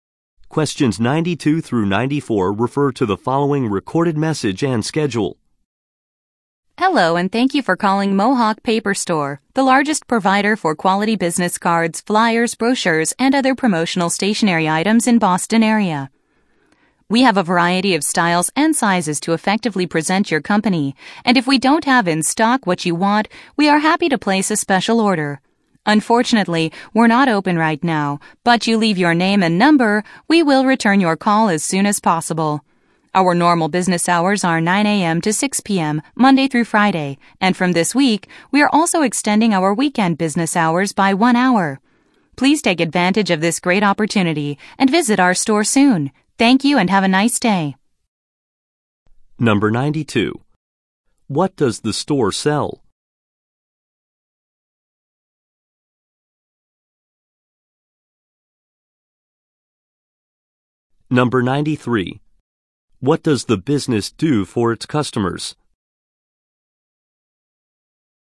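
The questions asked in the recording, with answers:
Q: What does the store sell?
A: Business cards, flyers, brochures and promotional stationery

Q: What does the business do for its customers?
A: Places special orders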